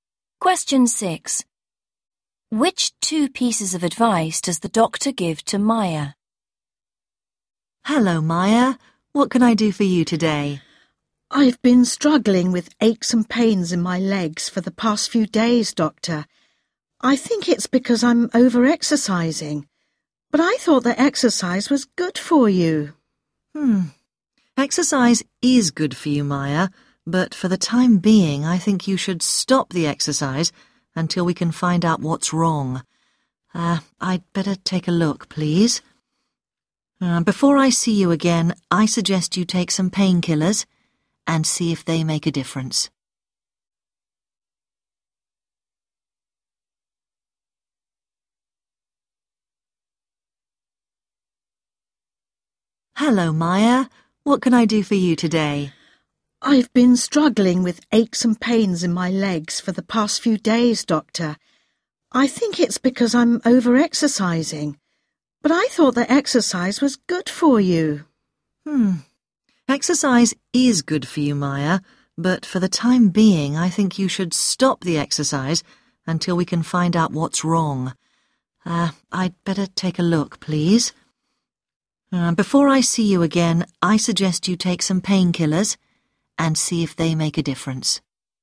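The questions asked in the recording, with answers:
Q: Which 2 pieces of advice does the doctor give to Maya?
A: Stop exercising and take painkillers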